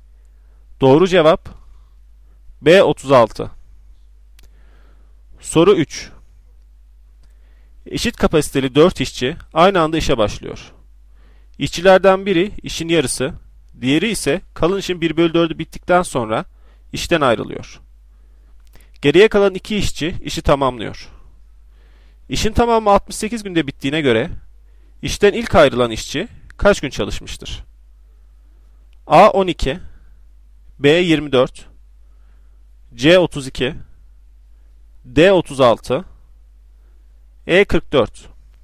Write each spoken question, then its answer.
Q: İşin tamamı 68 günde bittiğine göre işten ilk ayrılan işçi kaç gün çalışmıştır?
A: Doğru cevap B 24.